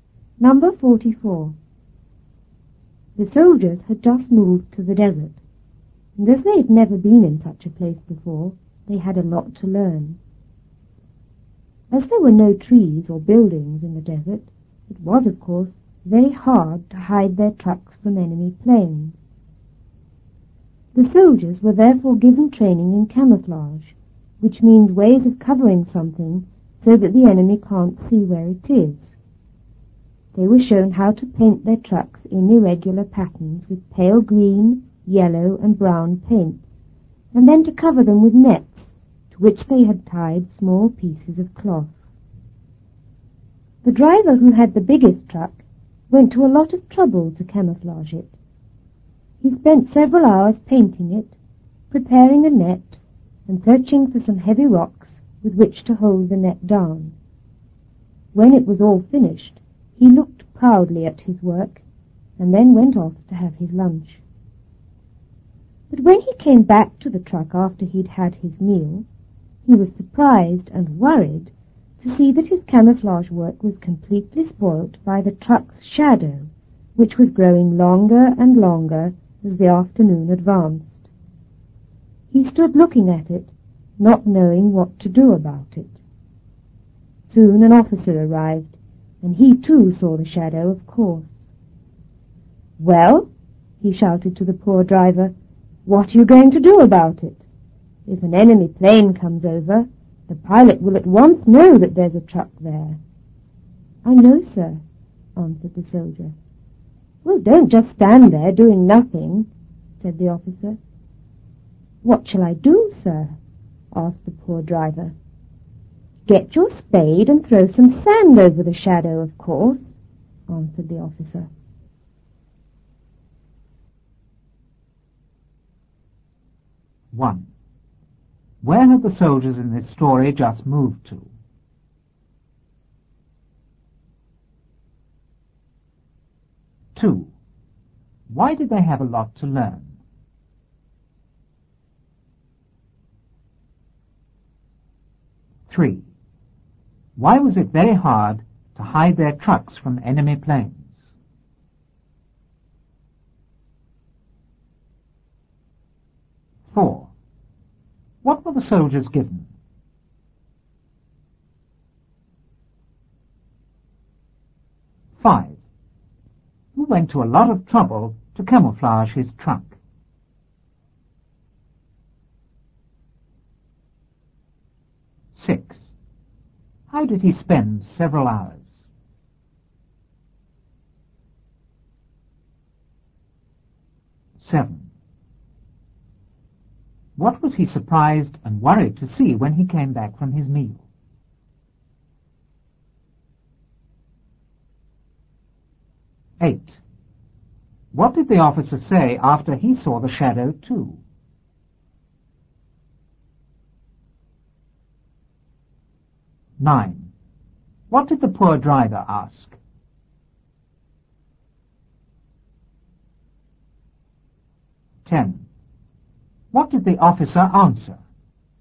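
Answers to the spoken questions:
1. To the desert
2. Because they had never been in such a place before
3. Because there were no trees or buildings in the desert
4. Training in camouflage
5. The driver who had the biggest truck
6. Painting his truck, preparing a net, and searching for heavy rocks to hold the net down
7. That the truck's shadow had completely spoilt his camouflage work
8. "What are you going to do about it? If an enemy plane comes over, the pilot will at once know there's a truck there."
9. "What shall I do, sir?"
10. "Get your spade and throw some sand over the shadow."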